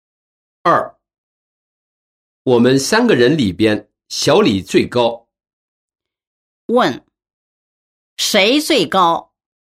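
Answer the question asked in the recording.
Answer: 小李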